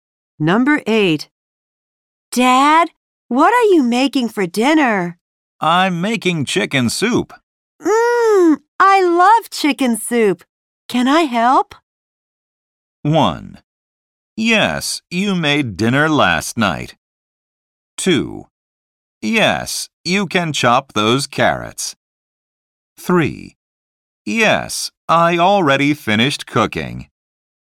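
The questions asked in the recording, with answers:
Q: I love chicken soup. Can I help?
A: 2: Yes, you can chop those carrots.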